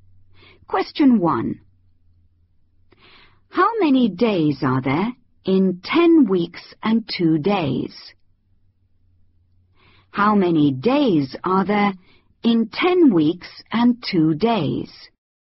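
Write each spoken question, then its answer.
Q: How many days are there in 10 weeks and 2 days?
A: 72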